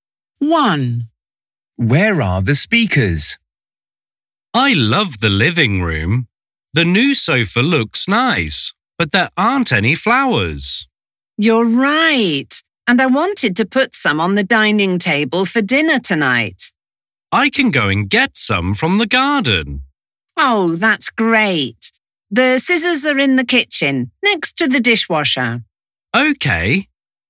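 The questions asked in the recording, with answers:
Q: Where are the speakers?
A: In the living room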